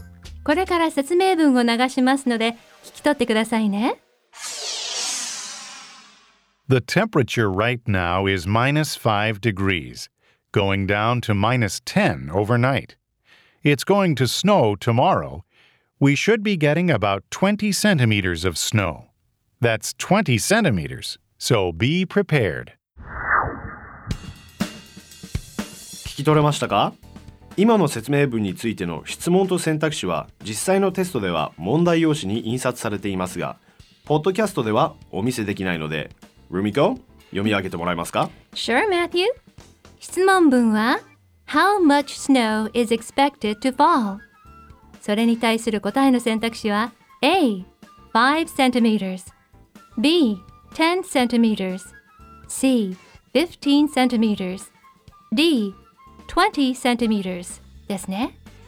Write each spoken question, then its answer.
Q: How much snow is expected to fall?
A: 正解は D 2 0 c ルとなりま